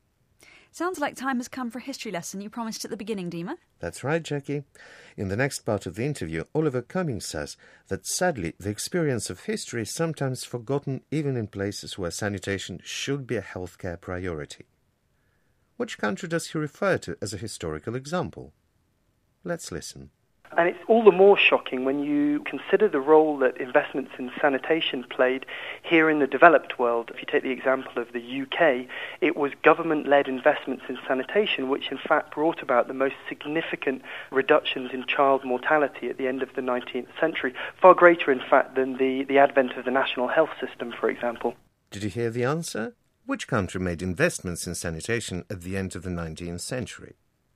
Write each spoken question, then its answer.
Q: Which country made investments in sanitation at the end of the 19th century?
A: It was the United Kingdom.